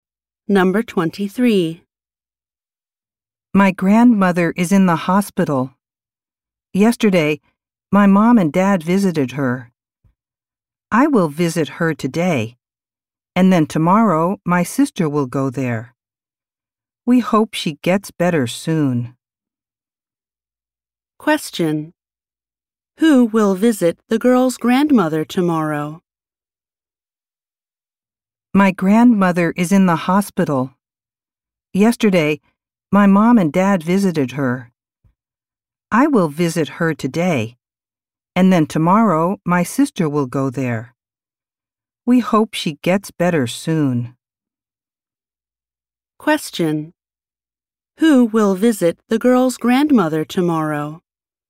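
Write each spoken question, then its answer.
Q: Who will visit the girl's grandmother tomorrow?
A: Her sister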